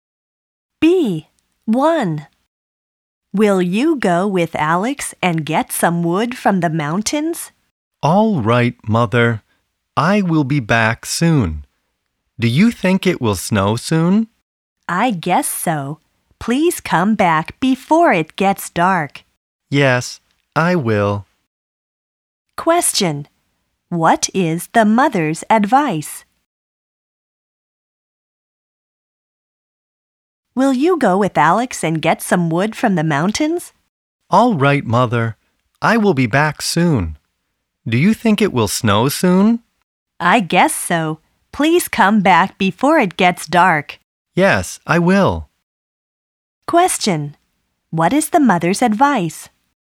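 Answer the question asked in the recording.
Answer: Come back before it gets dark.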